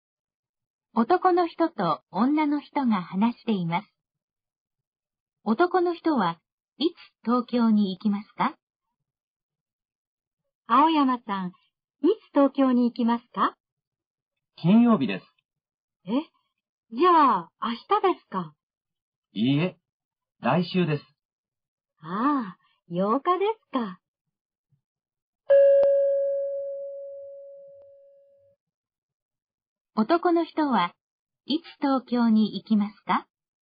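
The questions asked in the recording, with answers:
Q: 男の人はいつ東京に行きますか?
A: 来週の金曜日(8日)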